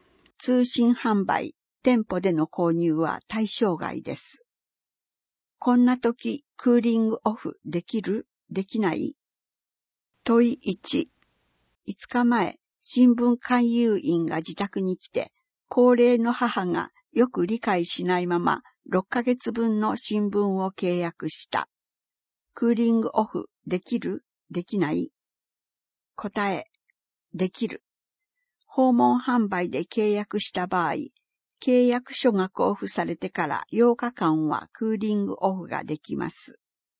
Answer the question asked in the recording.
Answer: 答え、できる。